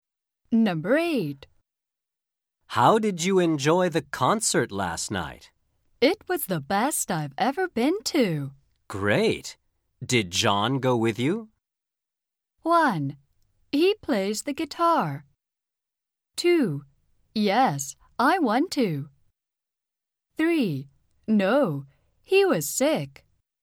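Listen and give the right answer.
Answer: 3: No, he was sick.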